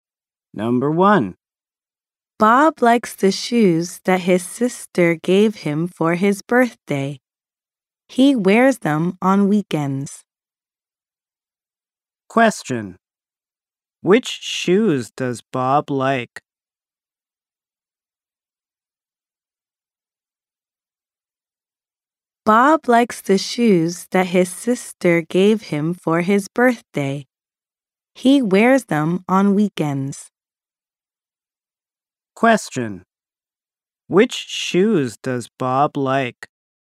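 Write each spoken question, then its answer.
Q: Which shoes does Bob like?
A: The shoes his sister gave him for his birthday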